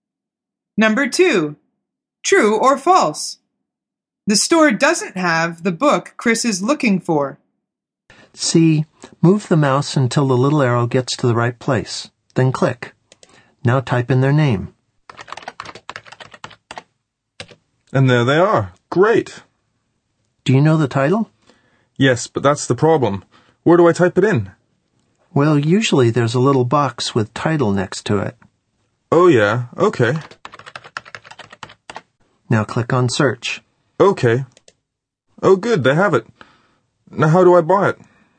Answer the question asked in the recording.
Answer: The answer is false.